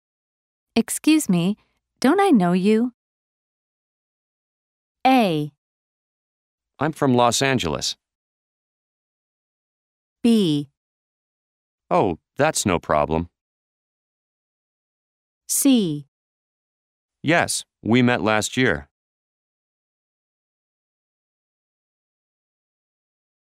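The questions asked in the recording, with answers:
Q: Excuse me, don't I know you?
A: C: Yes, we met last year.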